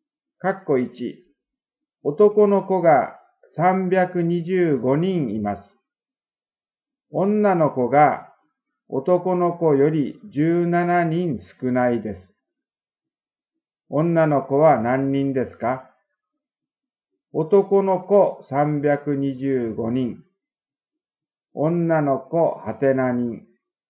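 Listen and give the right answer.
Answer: 308人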